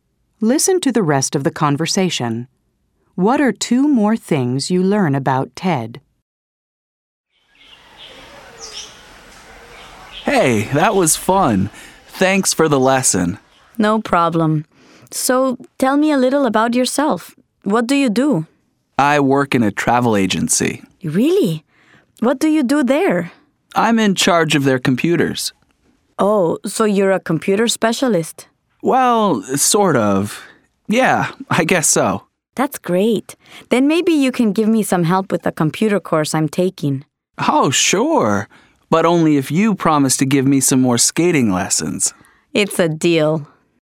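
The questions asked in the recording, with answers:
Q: What are two more things you learn about Ted?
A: He works in a travel agency and is in charge of its computers (a kind of computer specialist).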